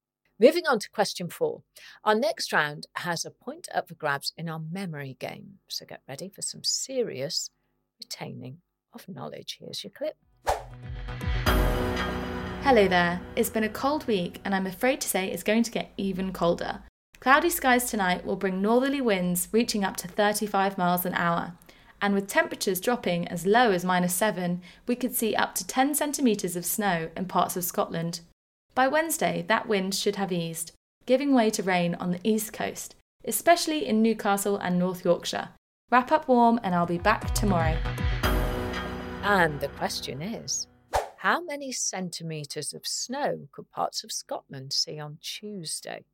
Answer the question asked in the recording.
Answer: And the answer I was looking for is 10 centimetres.